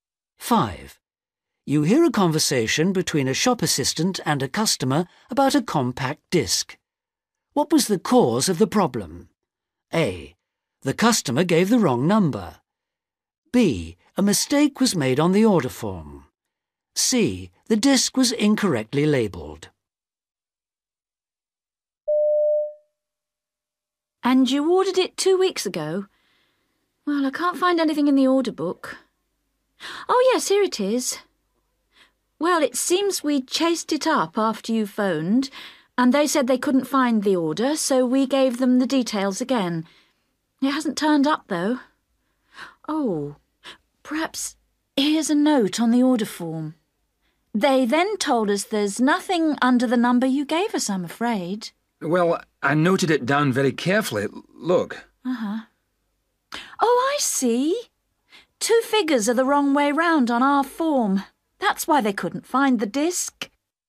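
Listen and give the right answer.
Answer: B: A mistake was made on the order form.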